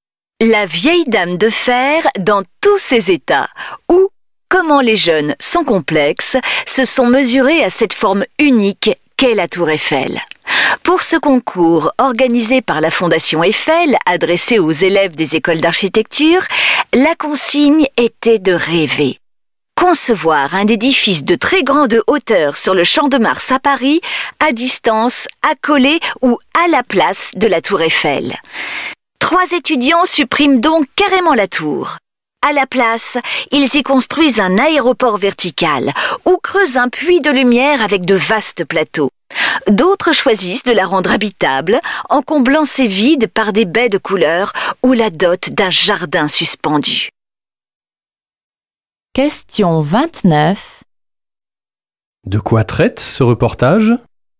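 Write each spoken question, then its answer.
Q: De quoi traite ce reportage ?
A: D'un concours d'architecture pour étudiants : imaginer un immeuble de très grande hauteur sur le Champ de Mars, à côté ou à la place de la tour Eiffel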